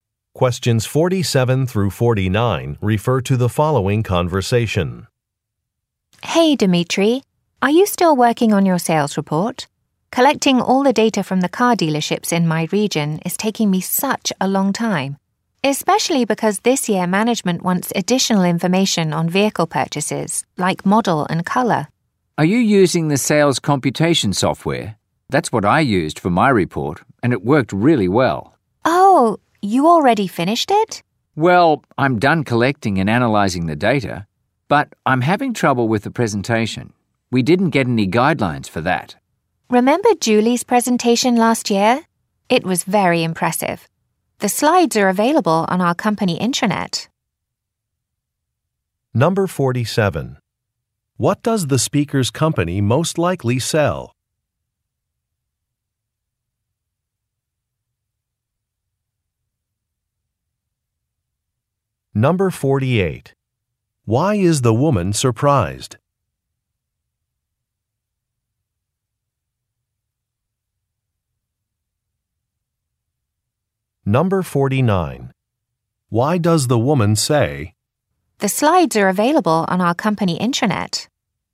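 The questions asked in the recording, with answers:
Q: What does the speaker's company most likely sell?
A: Cars (vehicles)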